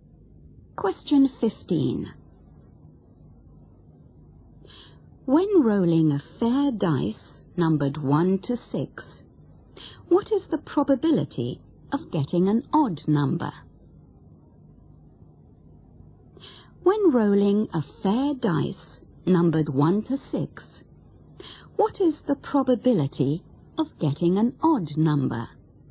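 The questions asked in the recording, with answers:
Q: When rolling a fair dice numbered 1 to 6, what is the probability of getting an odd number?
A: 1/2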